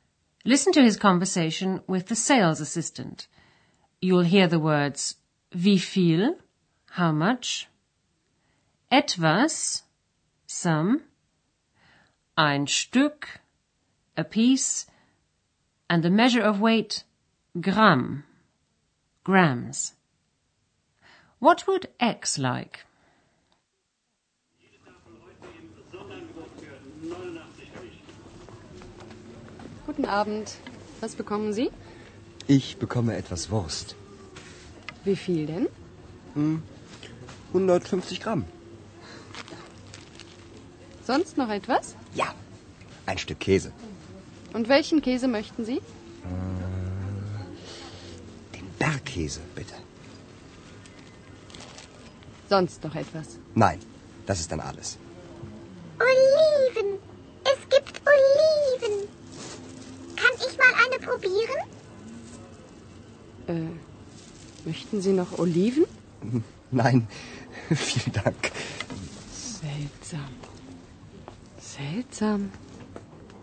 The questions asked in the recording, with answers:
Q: What would X like?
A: X has seen some olives and she'd like to try one.